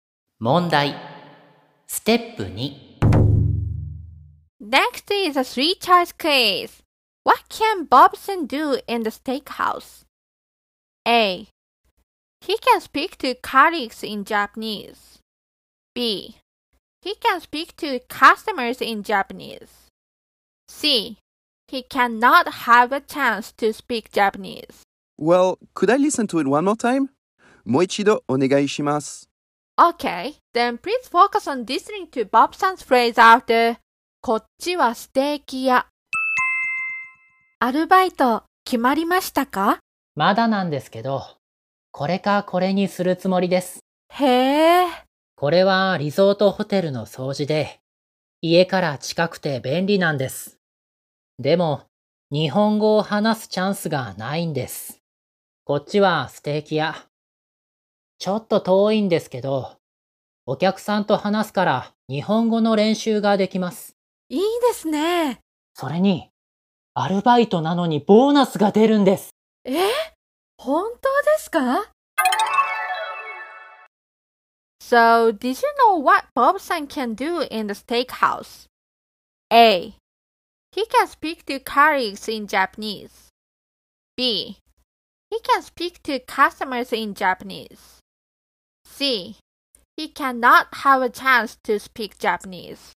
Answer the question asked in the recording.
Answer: So the answer must be B.